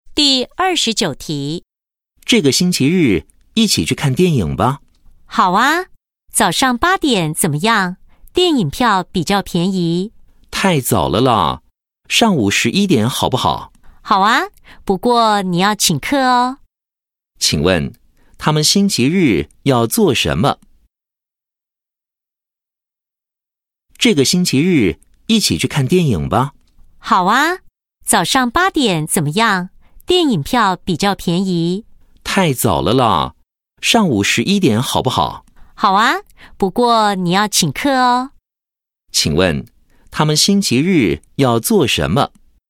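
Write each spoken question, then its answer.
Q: 请问他们星期日要做什么?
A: 看电影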